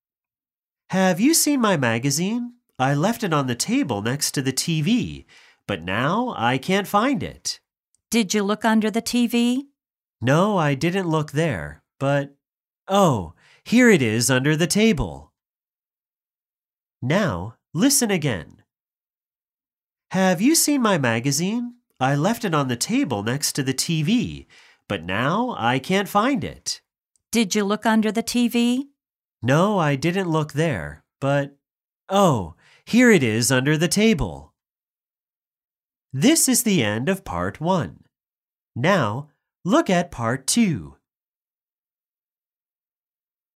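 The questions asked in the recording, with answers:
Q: Where is the magazine?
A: under the table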